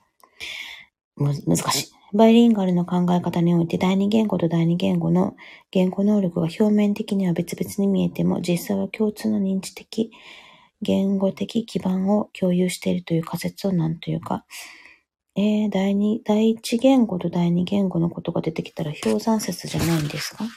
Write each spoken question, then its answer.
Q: バイリンガルの考え方において、第二言語と第二言語の言語能力が表面的には別々に見えても、実際は共通の認知的、言語的基盤を共有しているという仮説を何というか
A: 氷山説ですね。